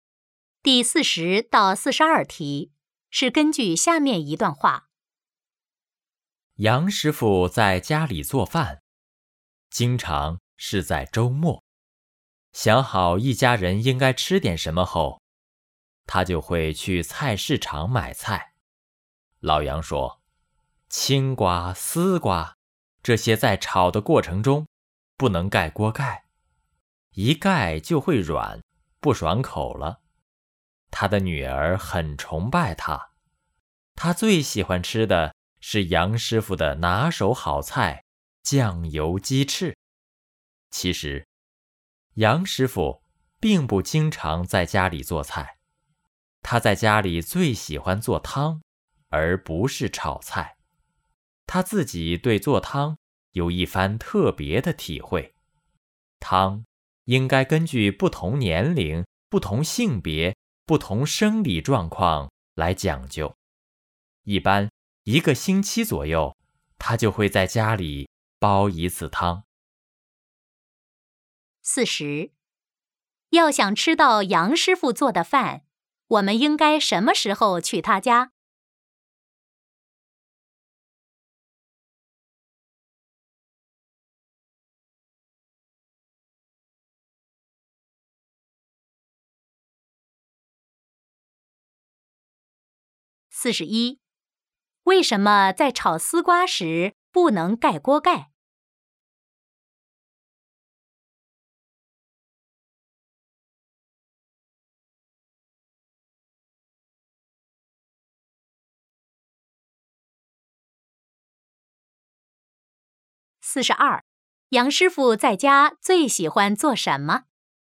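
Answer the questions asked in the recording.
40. 周末
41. 一盖就会软,不爽口
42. 做汤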